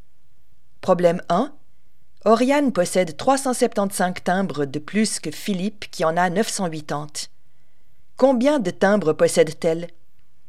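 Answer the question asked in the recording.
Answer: 1355 timbres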